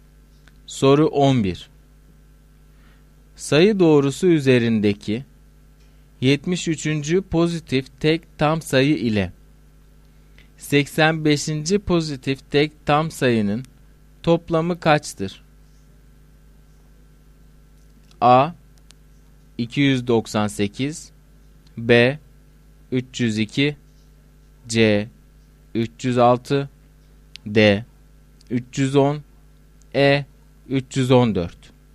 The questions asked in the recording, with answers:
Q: pozitif tek tam sayının toplamı kaçtır?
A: Doğru cevap E şıkkı.